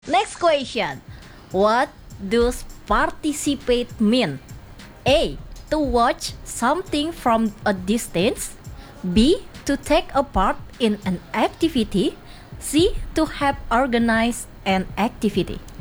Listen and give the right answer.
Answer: The answer is B.